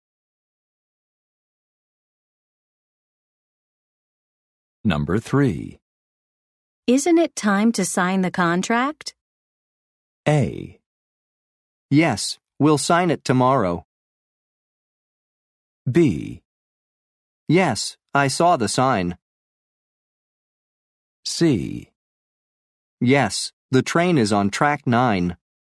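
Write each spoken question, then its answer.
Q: Isn't it time to sign the contract?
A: A: Yes, we'll sign it tomorrow.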